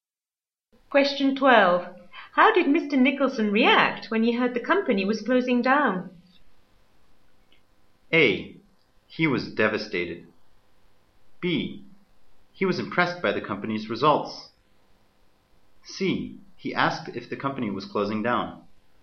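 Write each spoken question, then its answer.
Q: How did Mr. Nicholson react when he heard the company was closing down?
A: A: He was devastated.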